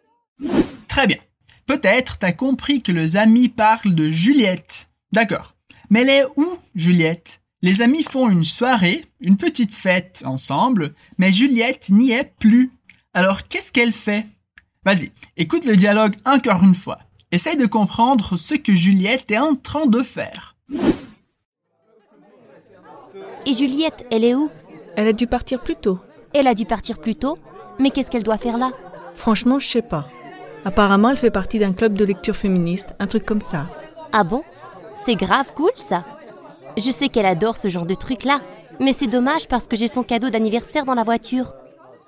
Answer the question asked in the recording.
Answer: Apparemment, elle fait partie d'un club de lecture féministe, un truc comme ça.